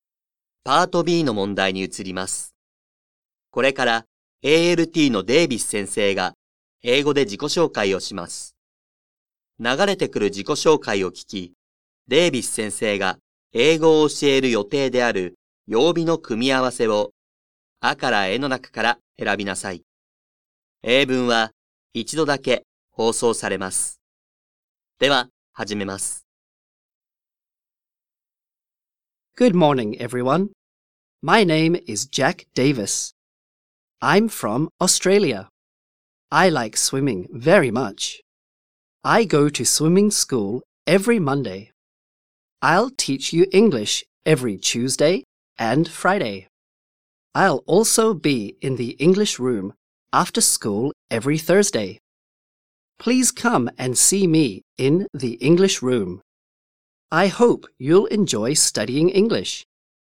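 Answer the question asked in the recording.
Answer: 火曜日と金曜日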